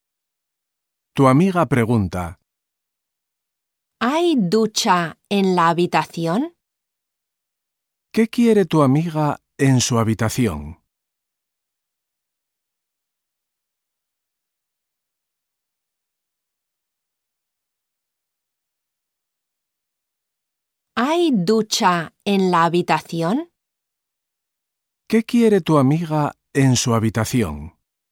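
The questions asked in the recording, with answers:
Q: ¿Qué quiere tu amiga en su habitación?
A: Una ducha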